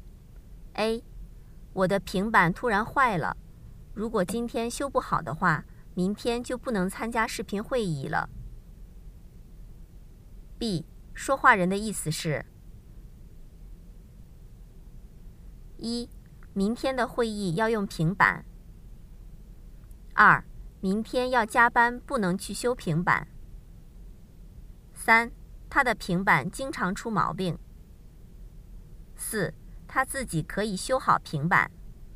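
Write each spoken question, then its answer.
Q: 说话人的意思是:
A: 一: 明天的会议要用平板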